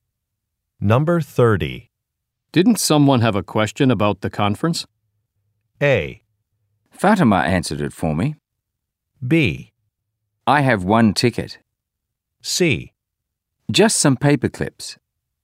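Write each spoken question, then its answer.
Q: Didn't someone have a question about the conference?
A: A: Fatima answered it for me.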